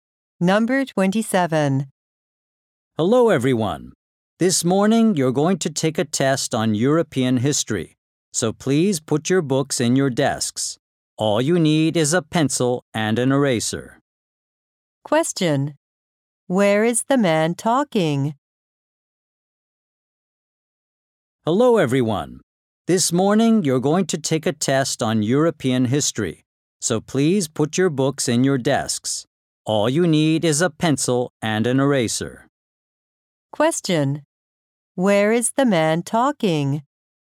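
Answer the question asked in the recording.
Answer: In a classroom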